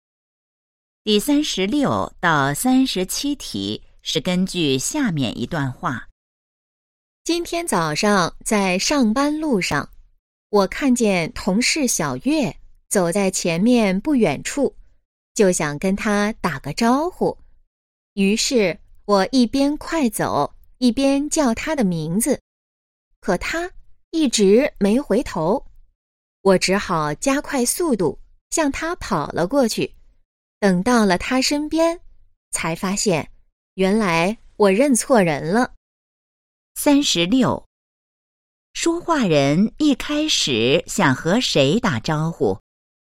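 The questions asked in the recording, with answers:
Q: 说话人一开始想和谁打招呼?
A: 同事小月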